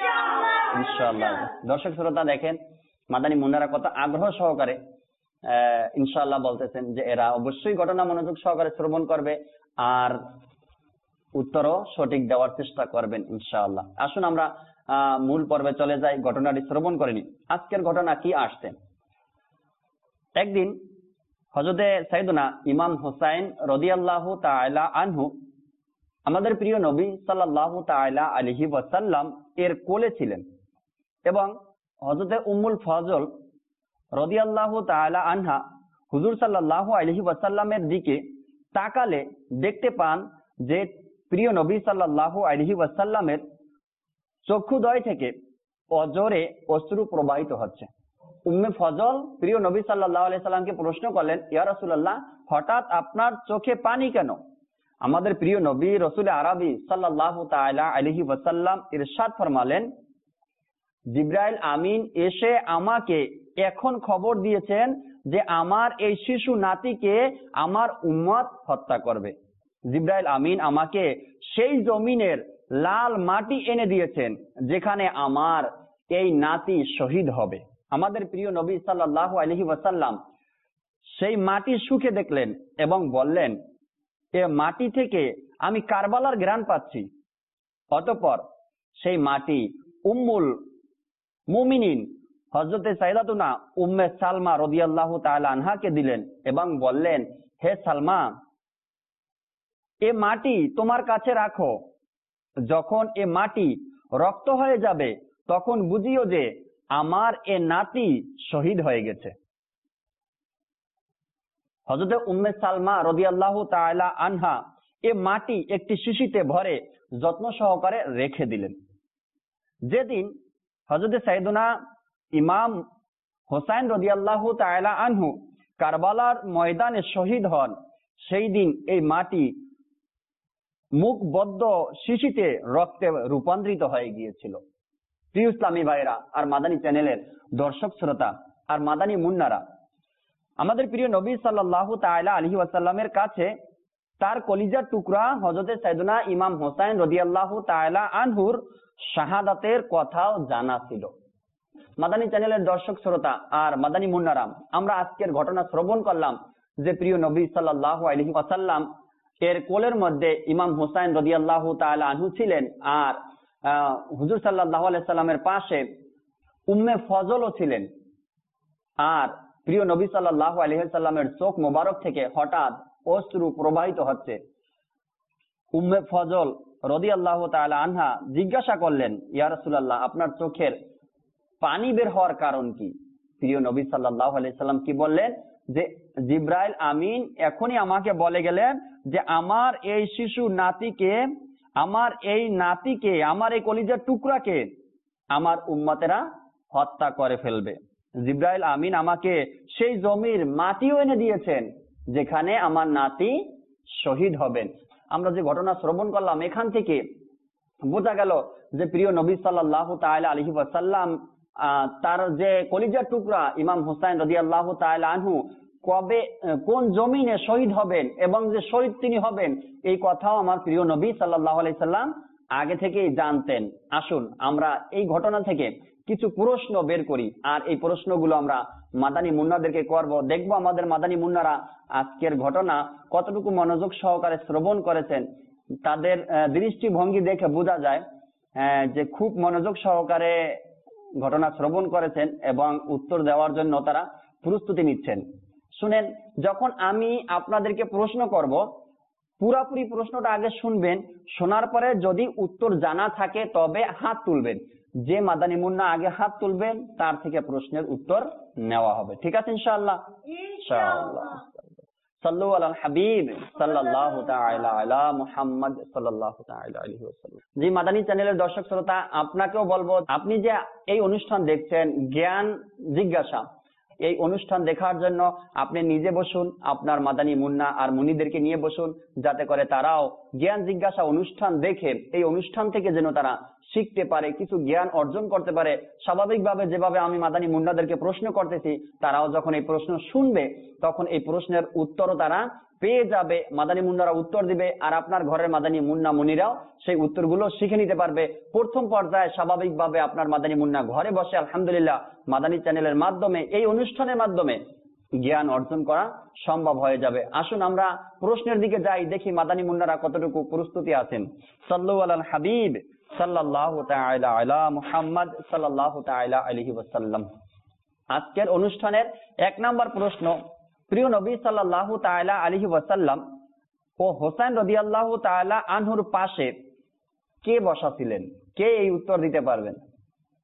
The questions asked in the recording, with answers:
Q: প্রিয় নবী সাল্লাল্লাহু তাআলা আলাইহি ওয়াসাল্লাম ও হোসাইন রাদিয়াল্লাহু তাআলা আনহুর পাশে কে বসাছিলেন, কে এই উত্তর দিতে পারবেন?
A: প্রিয় নবী সাল্লাল্লাহু তাআলা ইসলাম ও হোসাইন রাদিয়াল্লাহু তাআলা আনহুর পাশে উম্মে ফজল বসেছিলেন।